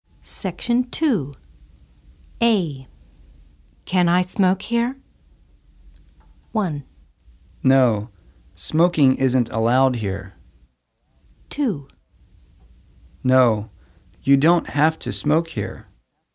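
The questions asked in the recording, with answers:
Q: Can I smoke here?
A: 1: No, smoking isn't allowed here.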